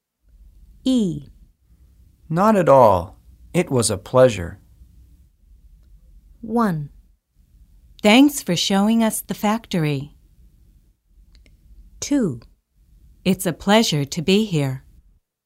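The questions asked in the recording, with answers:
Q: Not at all. It was a pleasure.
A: 1: Thanks for showing us the factory.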